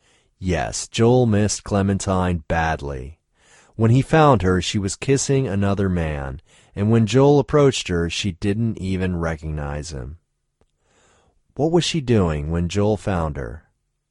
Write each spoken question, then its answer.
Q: What was she doing when Joel found her?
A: She was kissing another man when Joel found her.